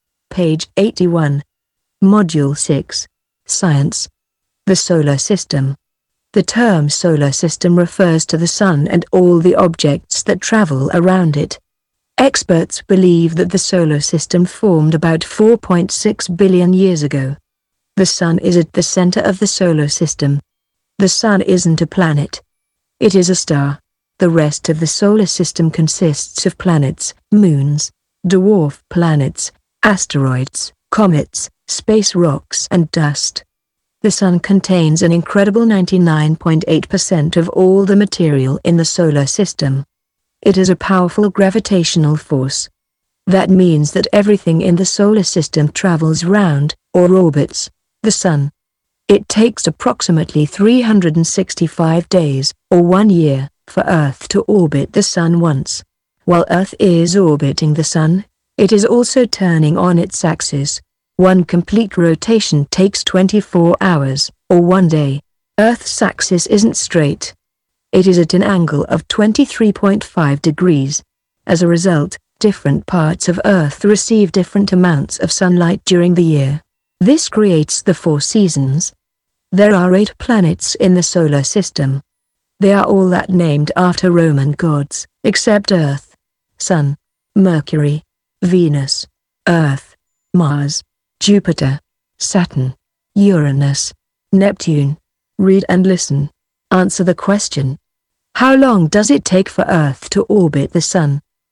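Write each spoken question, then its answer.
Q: How long does it take for Earth to orbit the Sun?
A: Approximately 365 days, or 1 year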